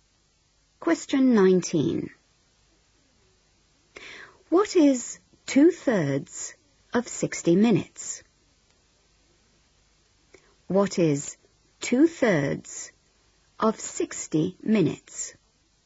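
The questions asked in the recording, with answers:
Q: What is 2/3 of 60 minutes?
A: 40 minutes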